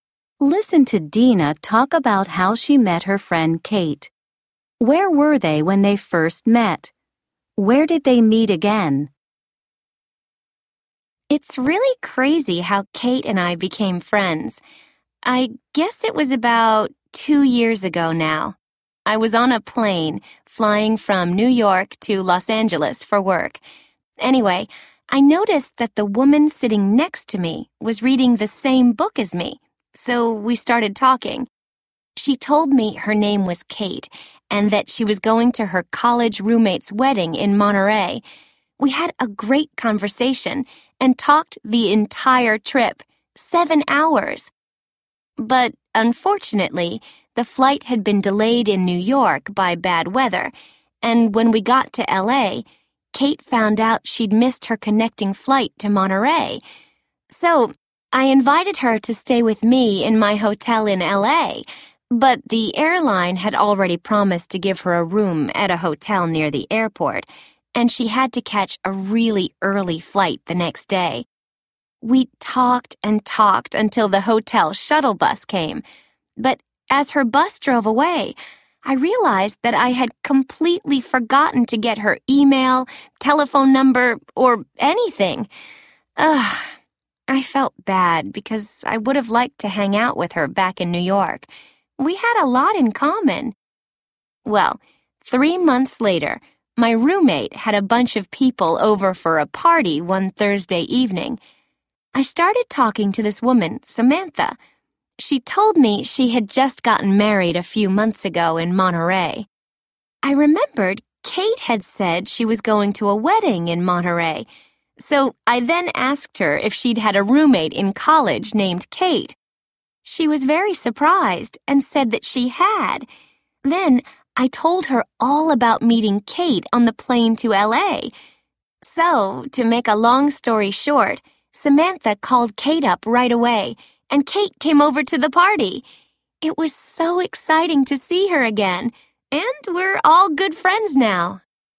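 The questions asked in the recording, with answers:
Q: Where were they when they first met?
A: On a plane from New York to Los Angeles

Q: Where did they meet again?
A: At a party at Dina's place, thrown by her roommate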